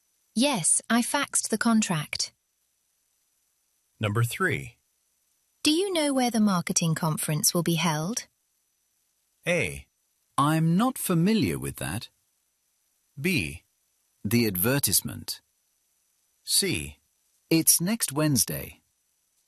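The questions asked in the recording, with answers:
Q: Do you know where the marketing conference will be held?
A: A: I'm not familiar with that.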